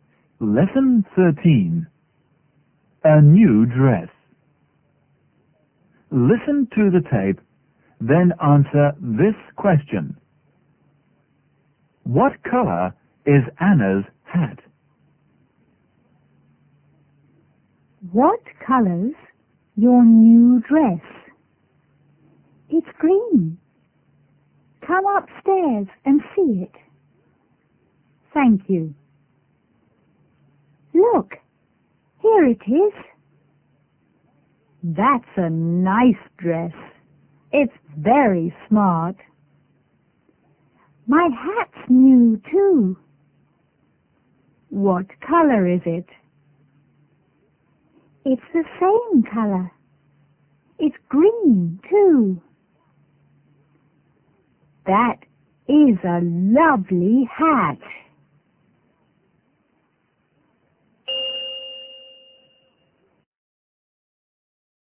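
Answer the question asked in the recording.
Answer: Green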